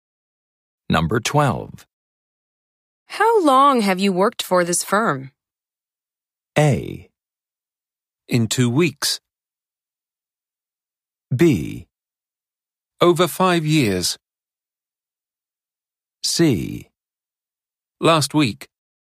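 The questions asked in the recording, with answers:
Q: How long have you worked for this firm?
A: B: Over 5 years.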